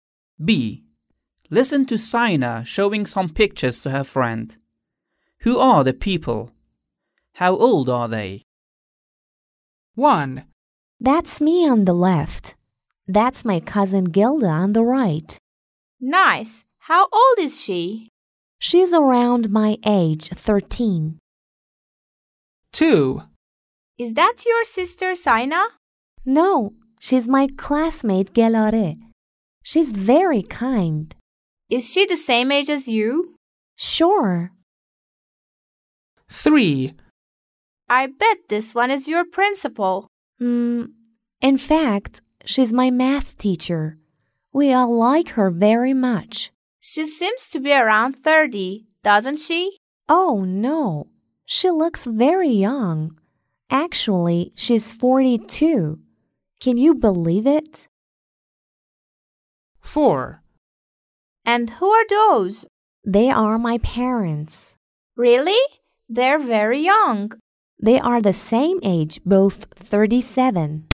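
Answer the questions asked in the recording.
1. Sina's cousin Gilda, 13
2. Sina's classmate Gelare, 13 (same age as Sina)
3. Sina's math teacher, 42
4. Sina's parents, both 37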